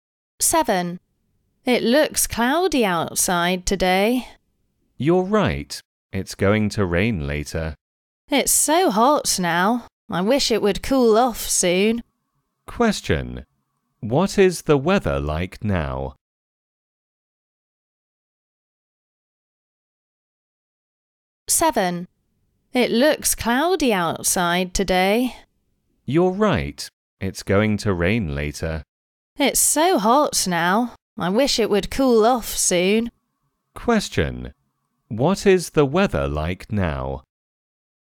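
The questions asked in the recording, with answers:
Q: Question. What is the weather like now?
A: Cloudy and hot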